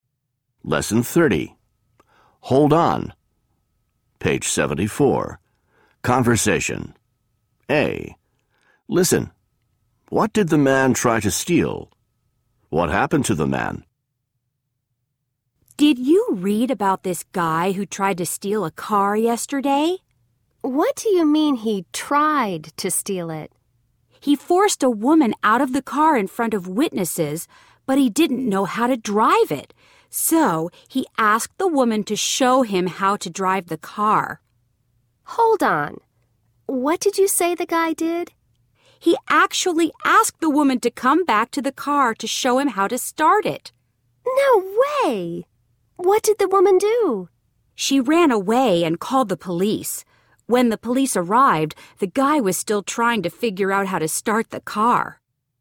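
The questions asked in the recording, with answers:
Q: What did the man try to steal?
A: A car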